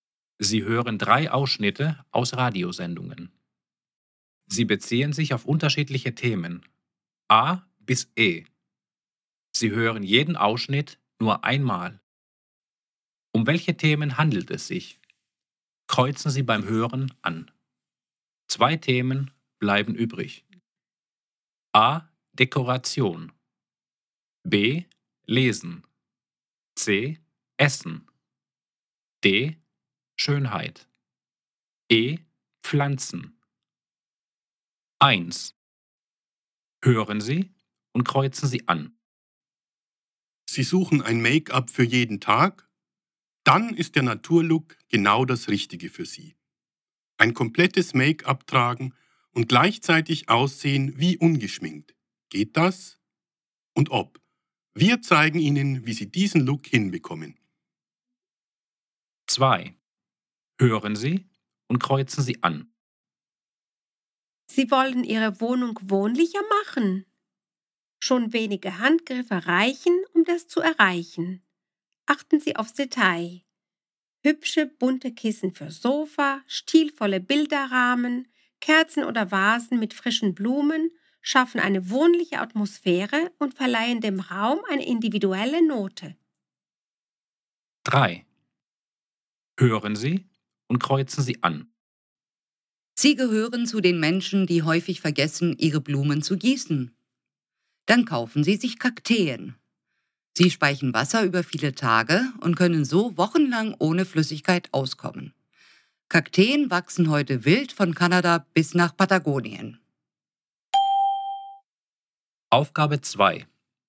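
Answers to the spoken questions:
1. D: Schönheit
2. A: Dekoration
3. E: Pflanzen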